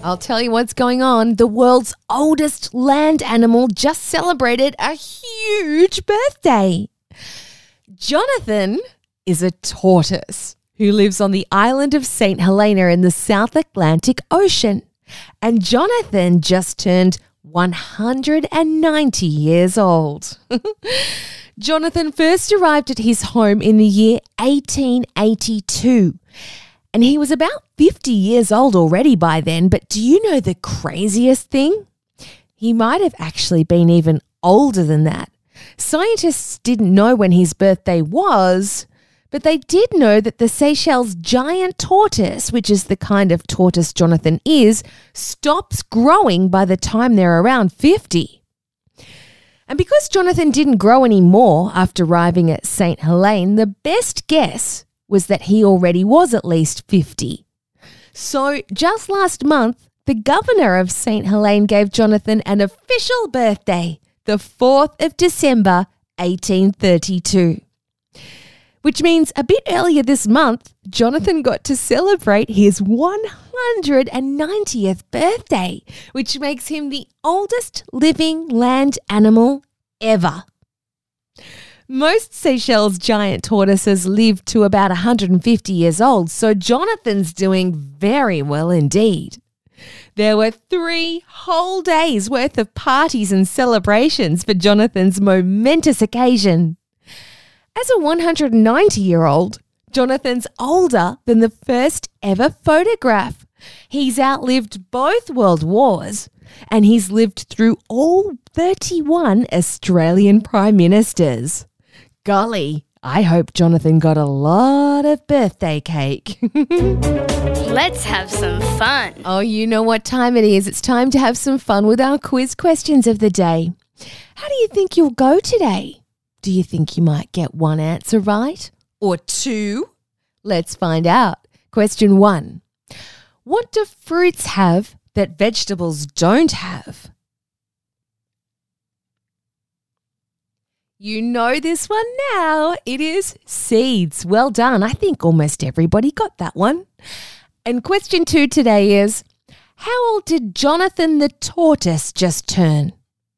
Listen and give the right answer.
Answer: He turned 190.